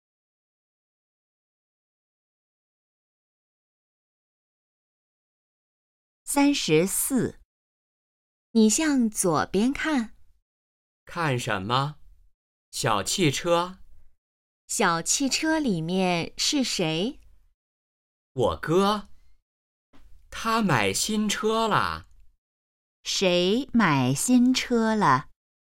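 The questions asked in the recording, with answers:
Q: 谁买新车了?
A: 哥哥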